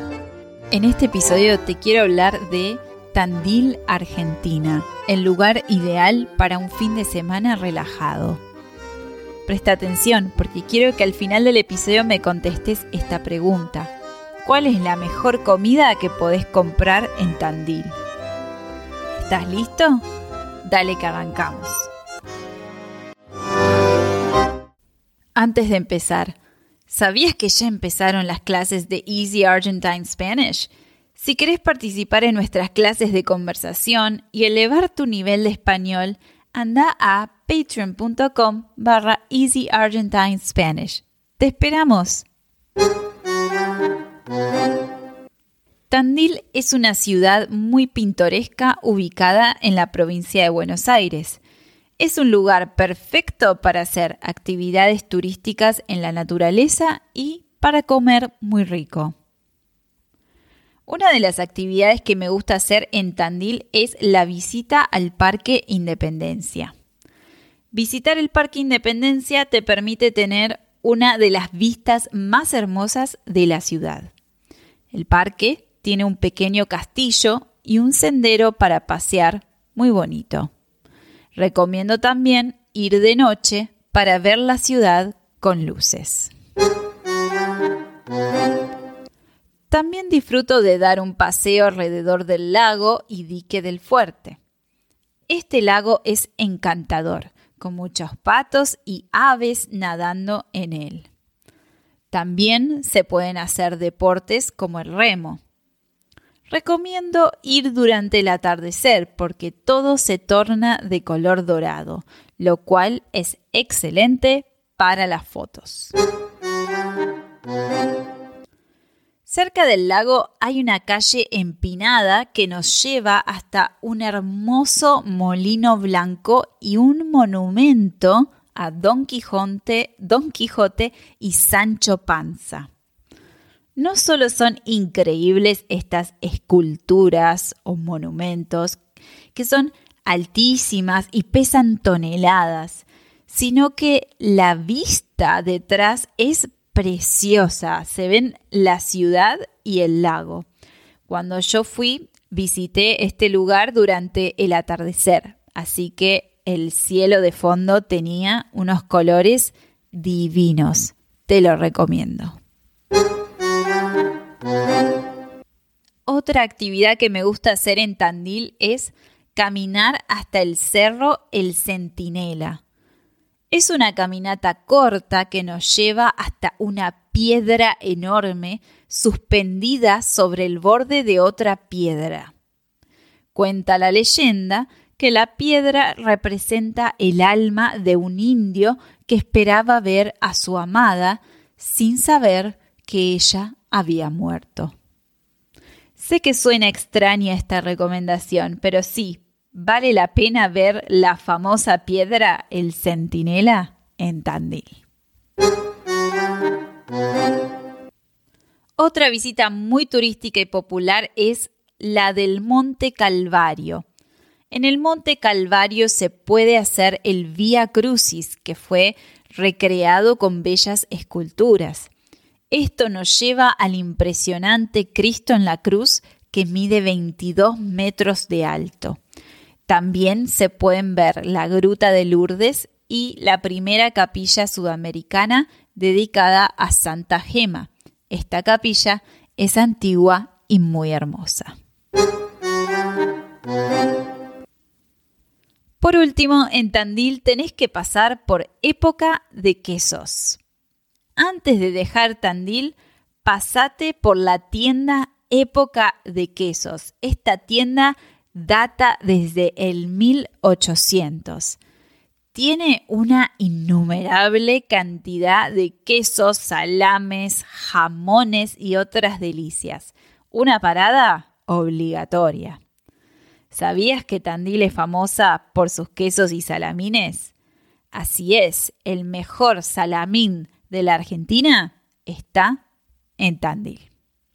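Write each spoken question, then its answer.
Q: ¿Cuál es la mejor comida que podés comprar en Tandil?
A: El salamín (Tandil es famosa por sus quesos y salamines)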